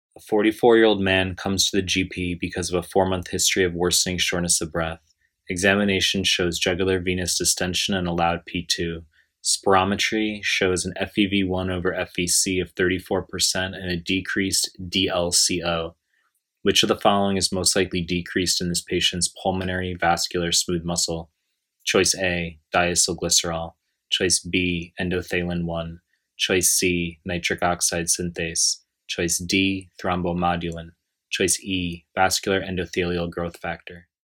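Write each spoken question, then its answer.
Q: Which of the following is most likely decreased in this patient's pulmonary vascular smooth muscle?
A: C: nitric oxide synthase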